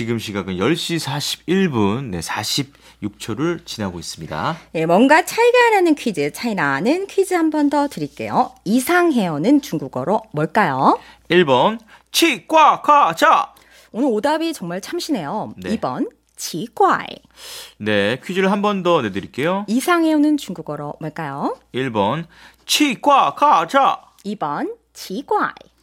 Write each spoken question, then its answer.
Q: 이상해어는 중국어로 뭘까요?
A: 2번 기괴 치과이.